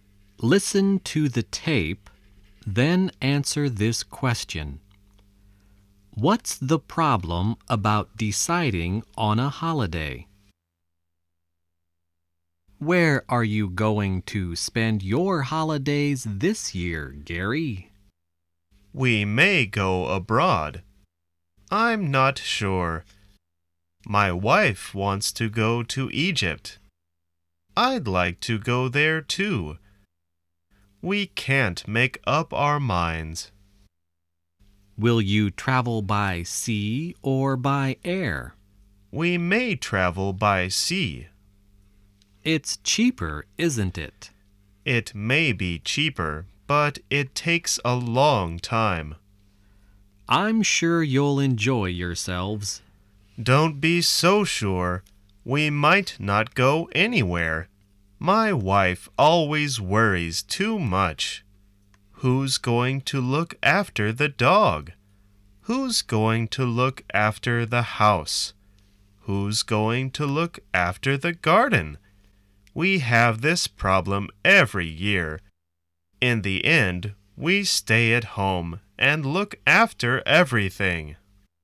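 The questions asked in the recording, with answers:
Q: What's the problem about deciding on a holiday?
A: Gary's wife worries about who will look after the dog, house and garden, so they can't decide and end up staying at home.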